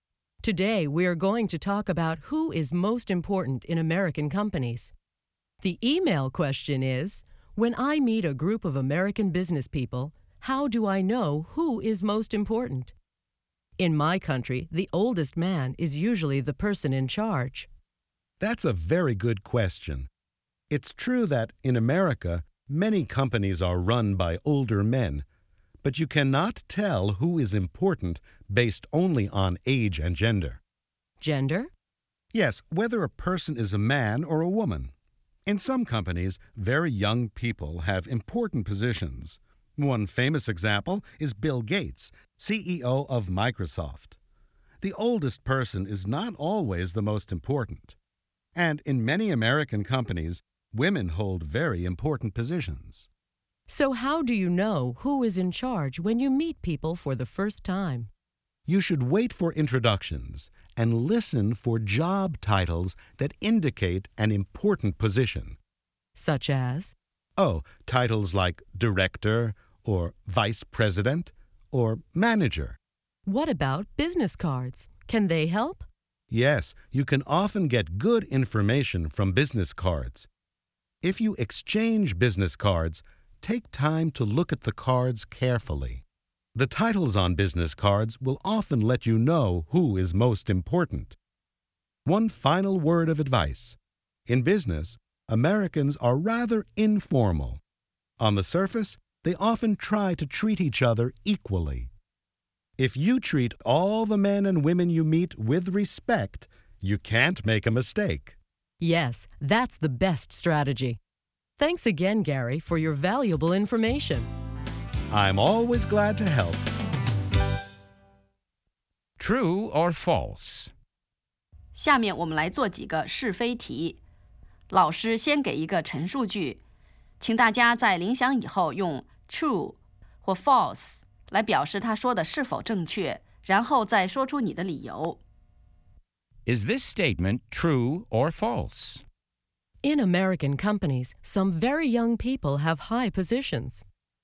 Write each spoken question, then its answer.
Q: In American companies, some very young people have high positions.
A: True. Young people sometimes have high positions in American companies.